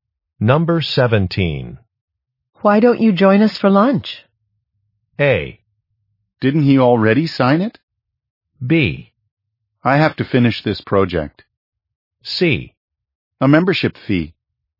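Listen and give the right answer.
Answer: B: I have to finish this project.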